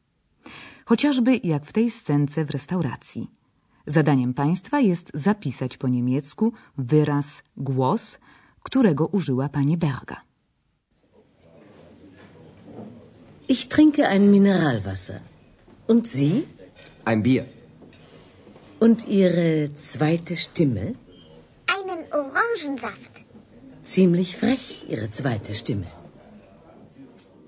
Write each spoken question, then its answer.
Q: Zadaniem państwa jest zapisać po niemiecku wyraz głos, którego użyła pani Berga.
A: wyraz sztymę, głos